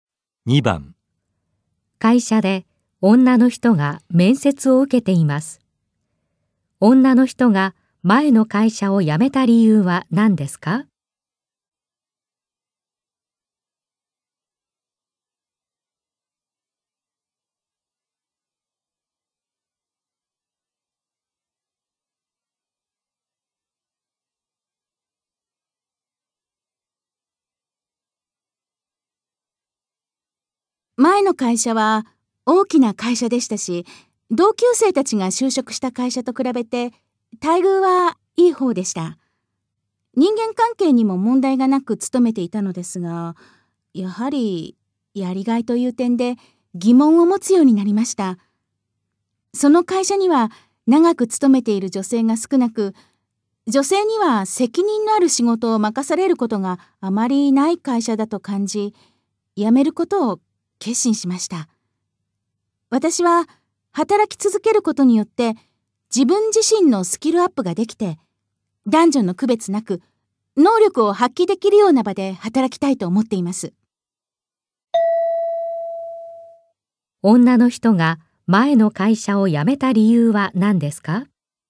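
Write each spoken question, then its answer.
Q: 女の人が前の会社を辞めた理由は何ですか?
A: 女性に責任のある仕事が任されず、やりがいがなかったから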